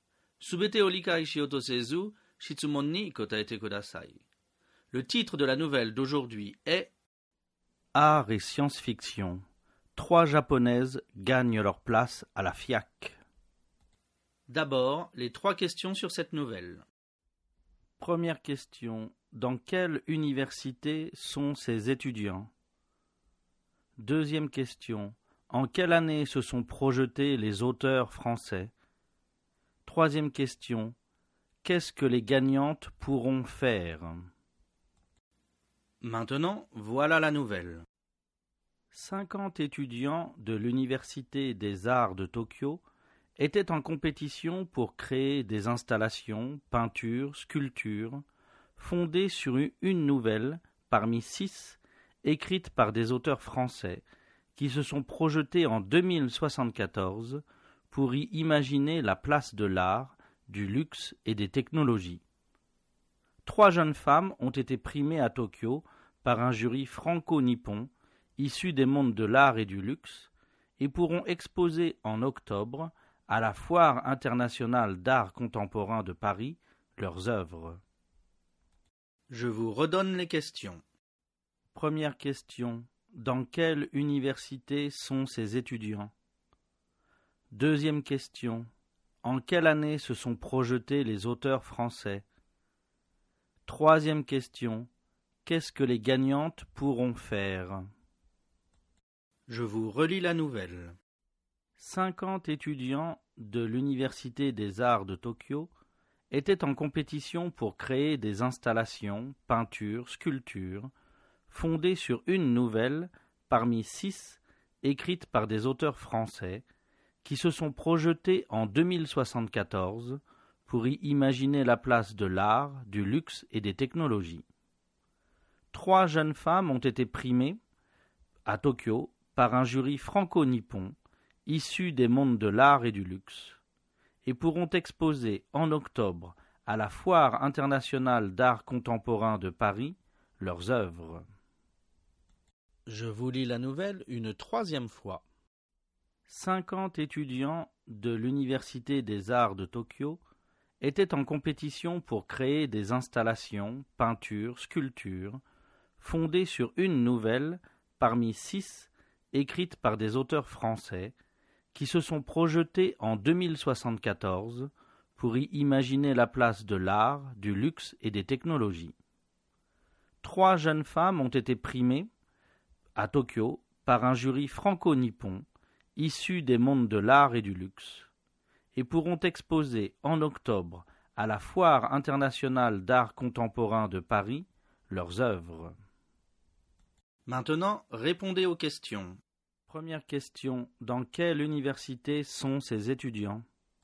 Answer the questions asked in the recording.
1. Réponse, ces étudiants sont à l'Université des Arts de Tokyo.
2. Réponse. Les auteurs se sont projetés en 2074.
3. Réponse. Les gagnantes pourront exposer leurs œuvres en octobre à la Foire internationale d'art contemporain de Paris.